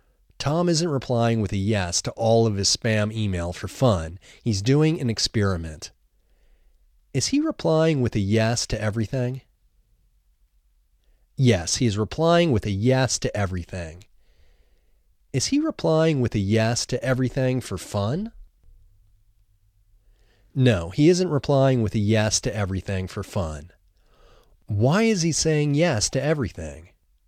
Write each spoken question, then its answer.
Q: Why is he saying yes to everything?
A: He is doing an experiment.